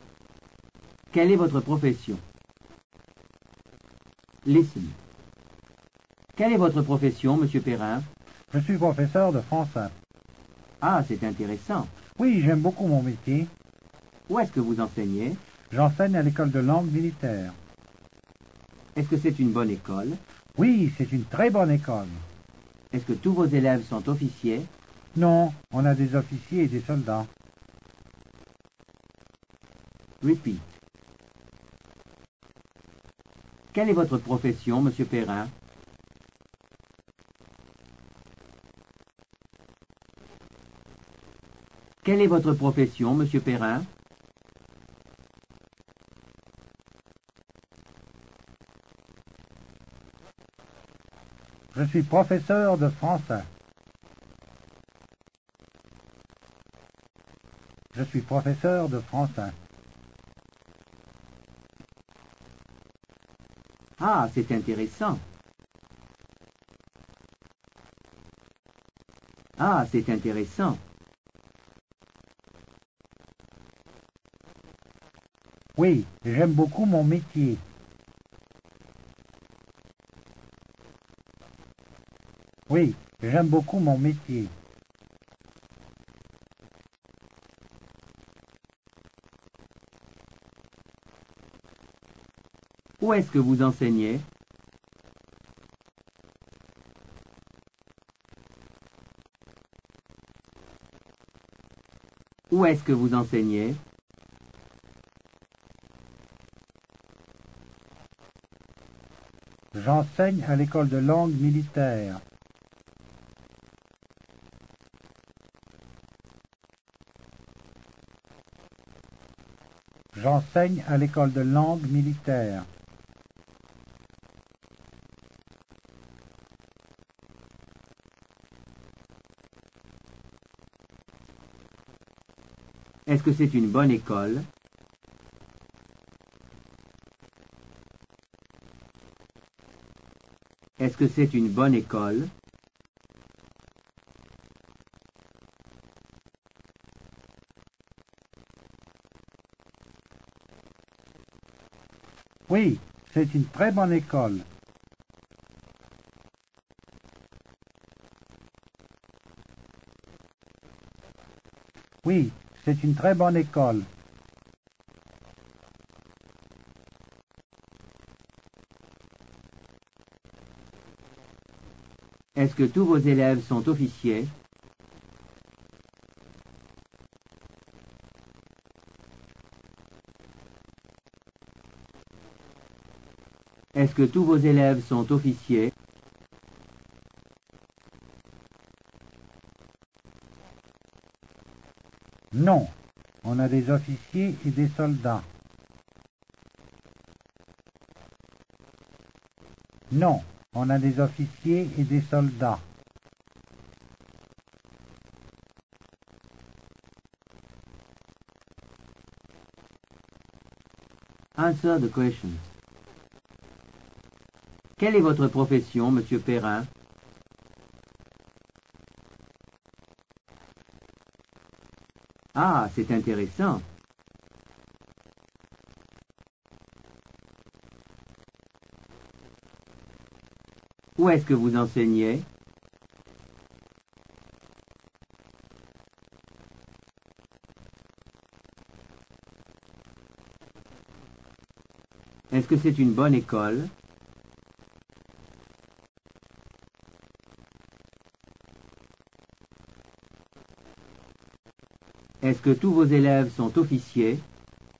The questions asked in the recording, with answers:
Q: Quelle est votre profession, monsieur Perrin?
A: Je suis professeur de français.

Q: Où est-ce que vous enseignez?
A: J'enseigne à l'école de langue militaire.

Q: Est-ce que c'est une bonne école?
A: Oui, c'est une très bonne école.

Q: Est-ce que tous vos élèves sont officiers?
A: Non, on a des officiers et des soldats.